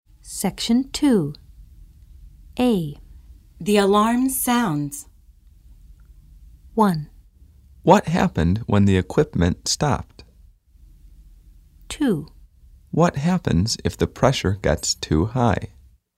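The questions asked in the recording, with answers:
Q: The alarm sounds.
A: 2: What happens if the pressure gets too high?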